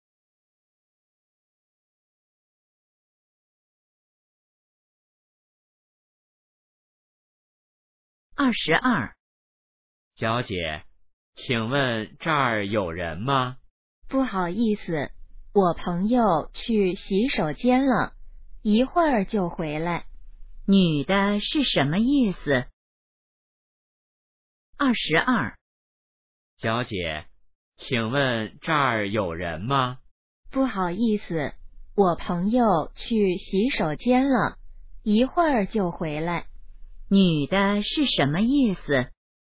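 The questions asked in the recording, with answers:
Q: 女的是什么意思?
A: 这儿有人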